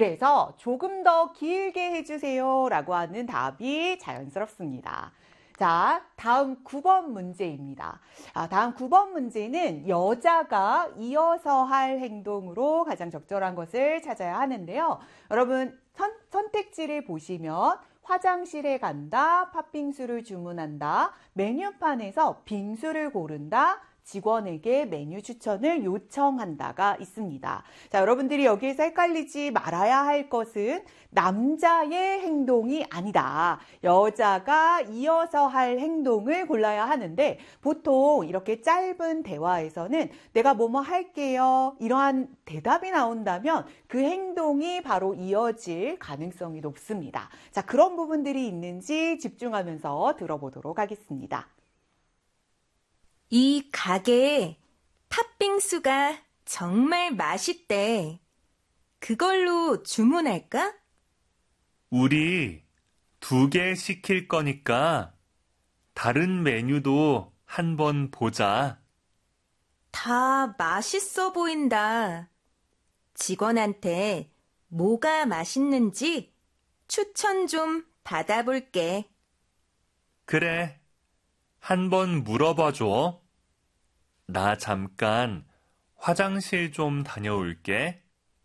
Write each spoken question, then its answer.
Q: 다음 9번 문제는 여자가 이어서 할 행동으로 가장 적절한 것을 찾아야 하는데요.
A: 그래서 9번의 정답은 4번이고요.